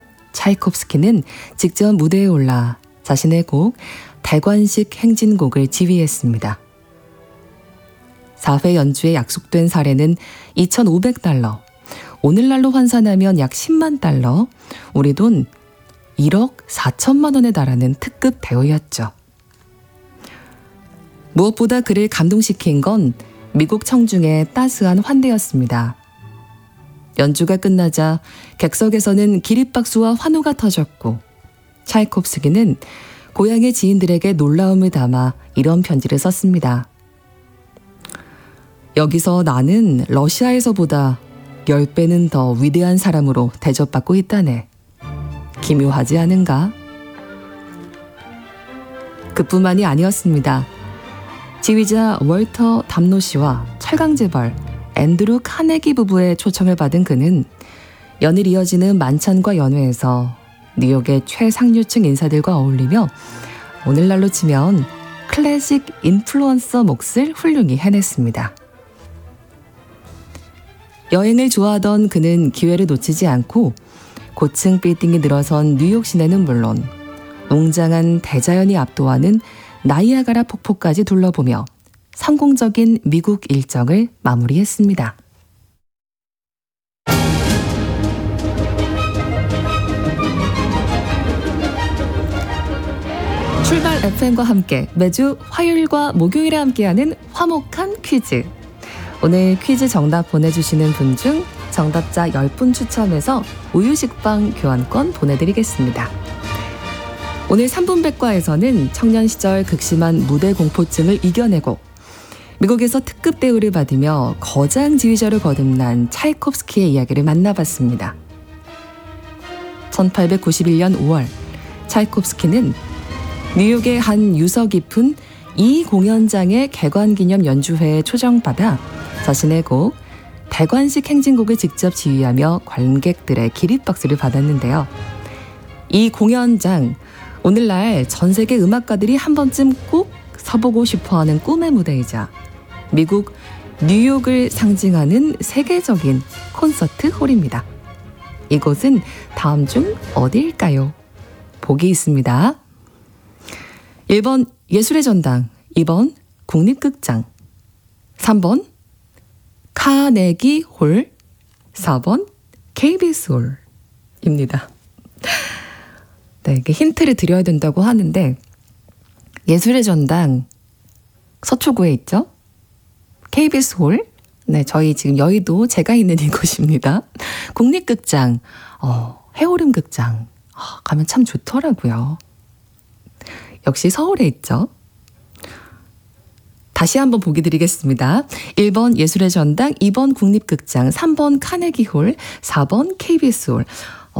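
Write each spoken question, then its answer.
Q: 이곳은 다음 중 어디일까요?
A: 3번: 카네기 홀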